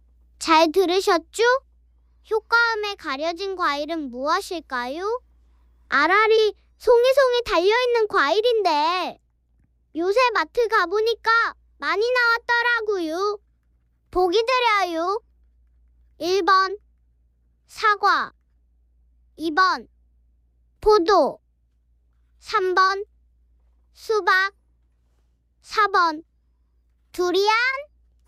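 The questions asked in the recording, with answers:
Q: 효과음에 가려진 과일은 무엇일까요?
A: 2번: 포도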